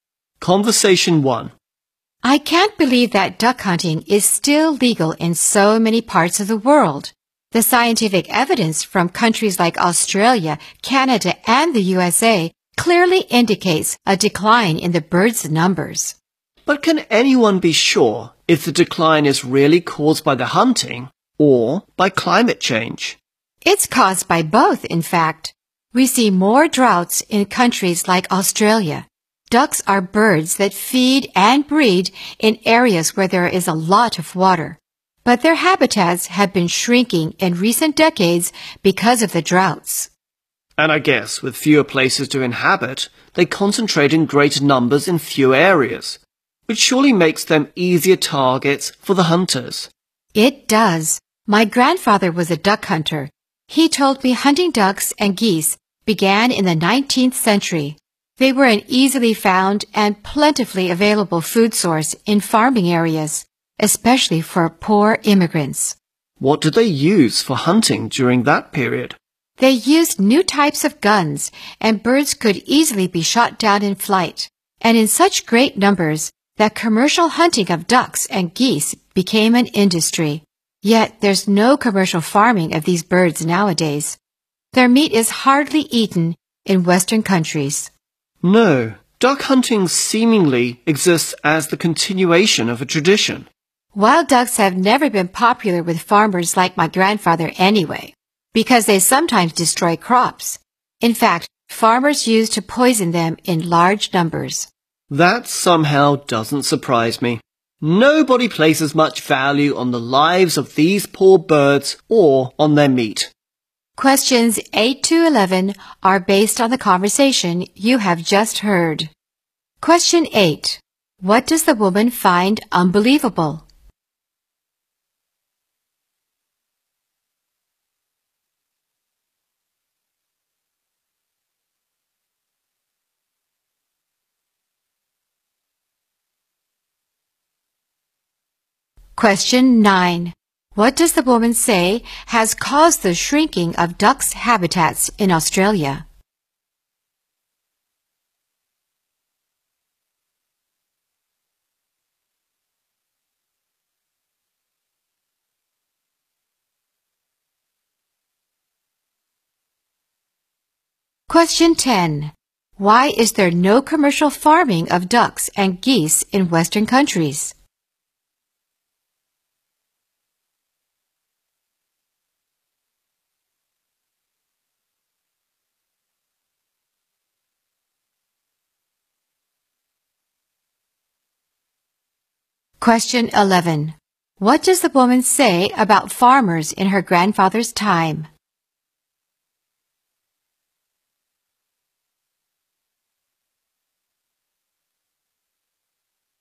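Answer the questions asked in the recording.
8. Duck hunting is still legal in many parts of the world
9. Droughts
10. Their meat is hardly eaten there
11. They used to poison ducks in large numbers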